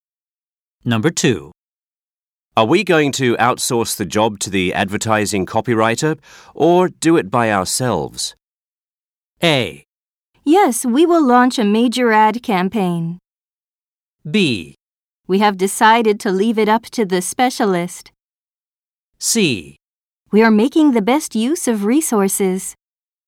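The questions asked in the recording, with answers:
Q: Are we going to outsource the job to the advertising copywriter or do it by ourselves?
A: B: We have decided to leave it up to the specialist.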